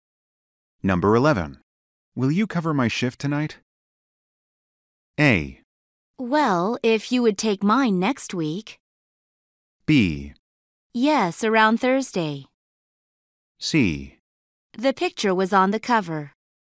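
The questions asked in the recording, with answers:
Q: Will you cover my shift tonight?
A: A: Well, if you would take mine next week.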